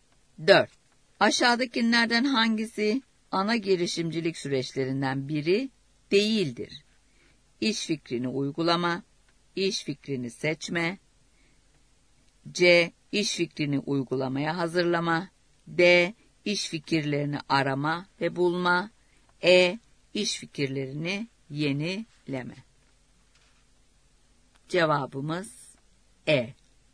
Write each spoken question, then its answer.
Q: Aşağıdakilerden hangisi ana girişimcilik süreçlerinden biri değildir?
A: Cevabımız E.